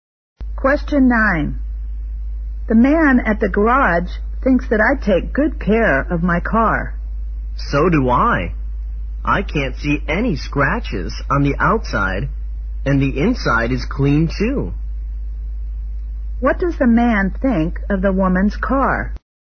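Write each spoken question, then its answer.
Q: What does the man think of the woman's car?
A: It is well kept, with no scratches and a clean inside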